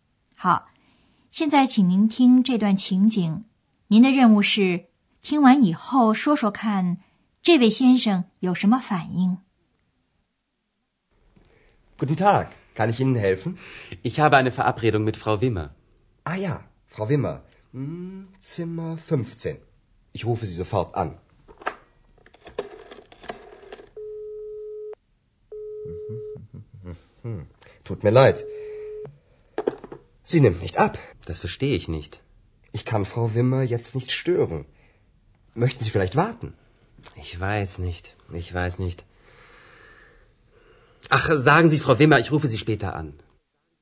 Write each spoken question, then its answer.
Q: 您的任务是听完以后说说看这位先生有什么反应。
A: 这位先生请他们转告 Wimmer 太太,他以后再给他打电话。